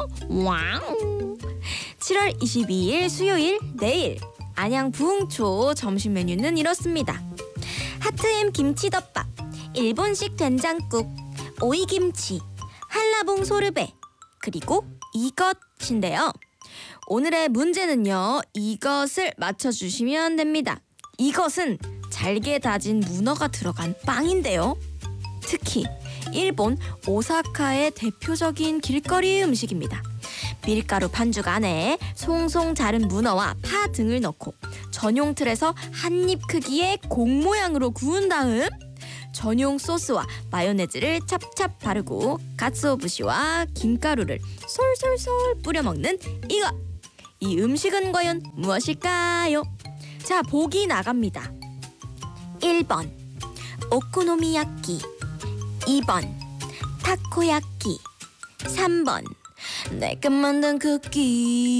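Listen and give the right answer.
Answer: 2번: 타코야끼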